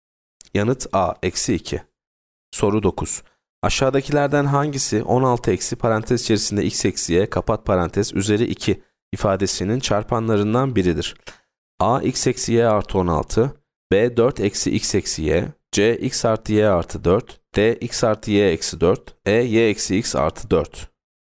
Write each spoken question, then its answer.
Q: Aşağıdakilerden hangisi 16 eksi parantez içerisinde x eksi y kapat parantez üzeri 2 ifadesinin çarpanlarından biridir?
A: Yanıt E y eksi x artı 4.